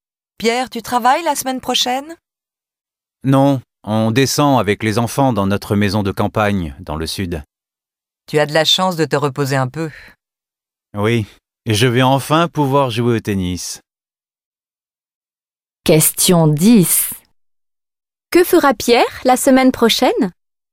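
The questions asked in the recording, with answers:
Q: Que fera Pierre la semaine prochaine?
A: Il ira avec les enfants dans sa maison de campagne, dans le sud, et jouera au tennis.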